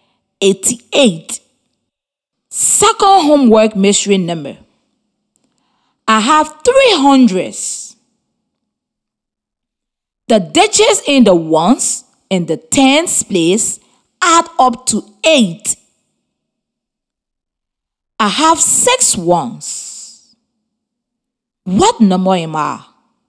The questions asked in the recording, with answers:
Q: What number am I?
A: 326.